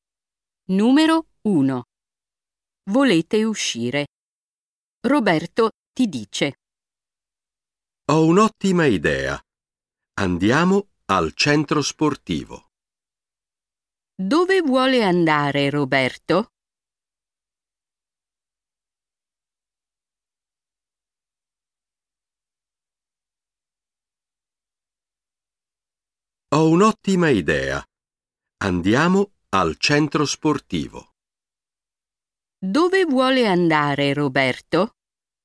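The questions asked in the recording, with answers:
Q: Dove vuole andare Roberto?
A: Al centro sportivo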